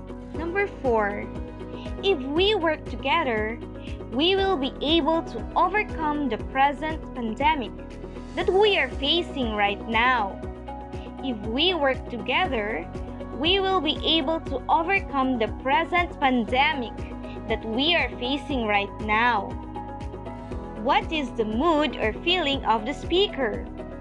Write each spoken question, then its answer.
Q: What is the mood or feeling of the speaker?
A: Yes, the speaker's mood or feeling is motivated.